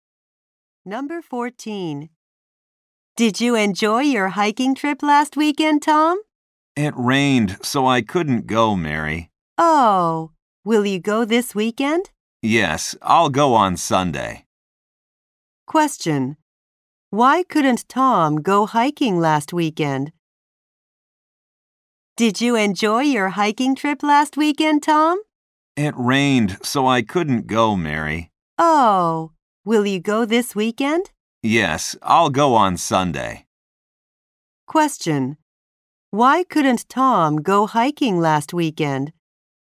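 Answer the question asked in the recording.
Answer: Because it rained.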